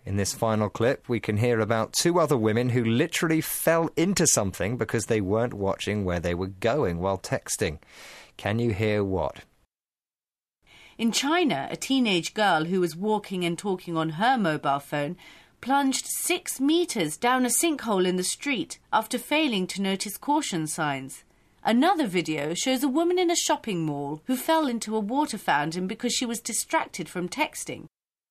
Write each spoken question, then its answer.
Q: Can you hear what?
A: Well, a teenage girl in China plunged, or fell, 6 metres down a sinkhole.